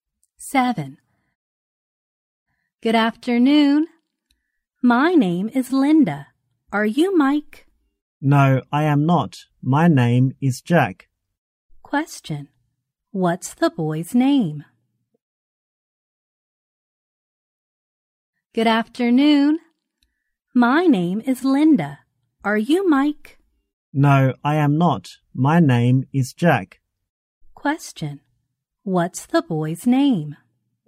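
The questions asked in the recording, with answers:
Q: What's the boy's name?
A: Jack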